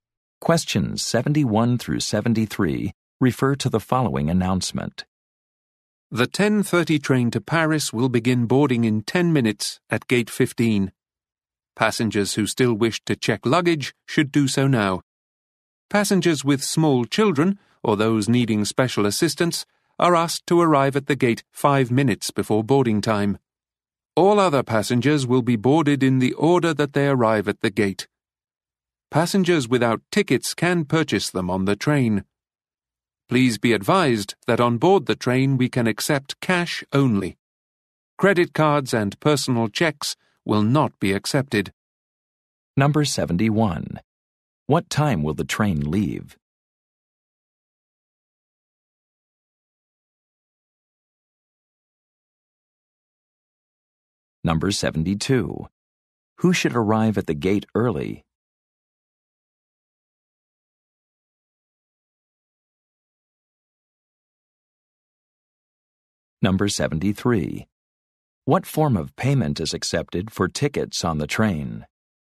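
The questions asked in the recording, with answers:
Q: What time will the train leave?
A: 10:30

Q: Who should arrive at the gate early?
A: Passengers with small children or needing special assistance

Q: What form of payment is accepted for tickets on the train?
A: Cash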